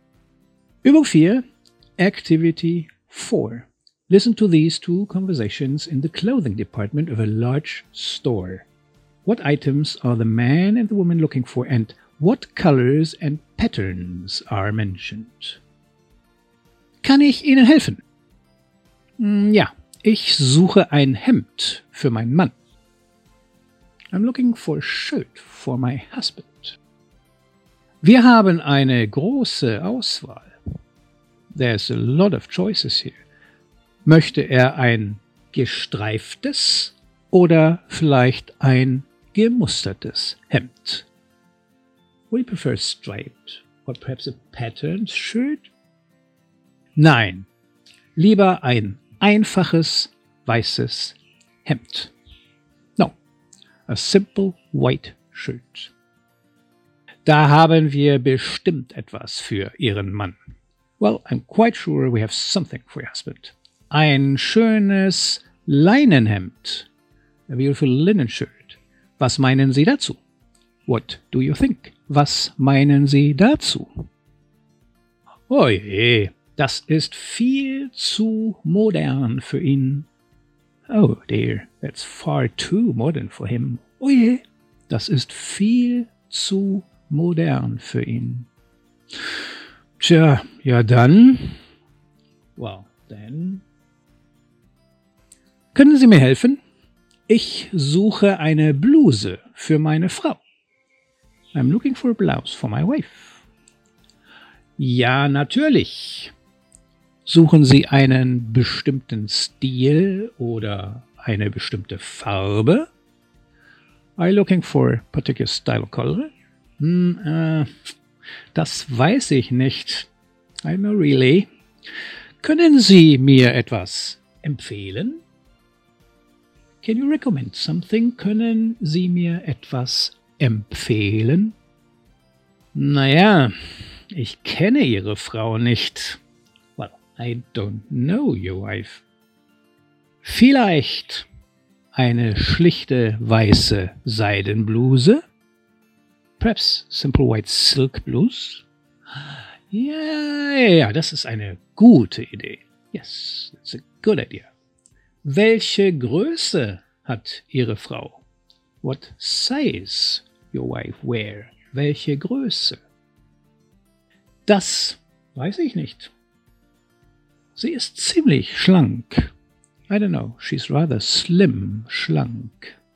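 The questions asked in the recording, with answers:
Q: What items are the man and the woman looking for, and what colors and patterns are mentioned?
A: The woman wants a shirt for her husband and the man wants a blouse for his wife; striped, patterned and white are mentioned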